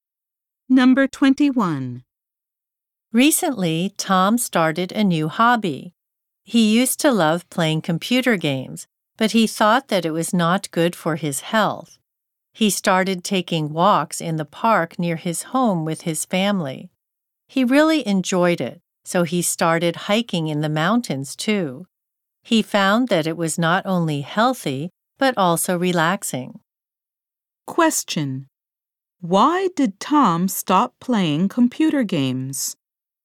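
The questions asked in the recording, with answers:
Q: Why did Tom stop playing computer games?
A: He thought it was not good for his health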